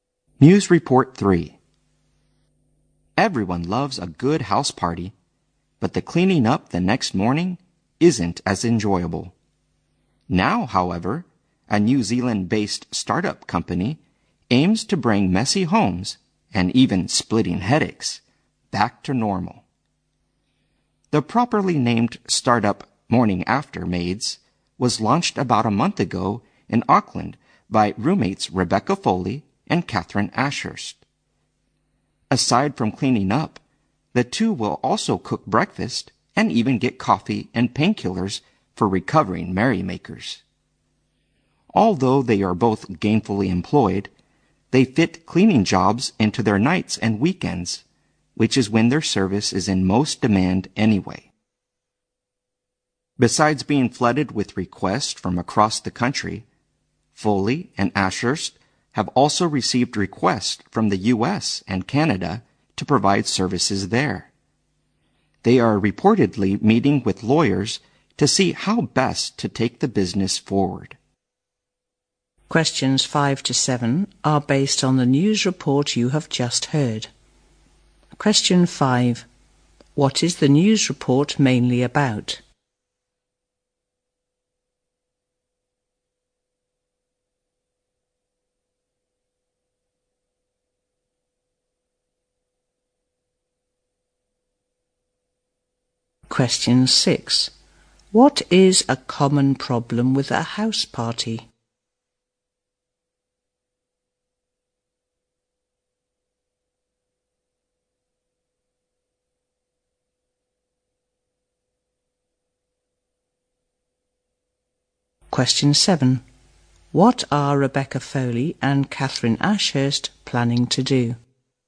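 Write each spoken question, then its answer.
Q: What is the news report mainly about?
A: A startup, Morning After Maids, that cleans up homes after house parties.

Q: What is a common problem with a house party?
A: Cleaning up the next morning.

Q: What are Rebecca Foley and Catherine Ashurst planning to do?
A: Meet with lawyers to see how best to take the business forward.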